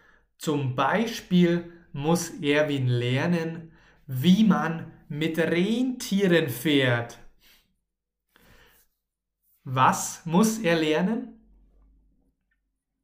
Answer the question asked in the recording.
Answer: Wie man mit Rentieren fährt.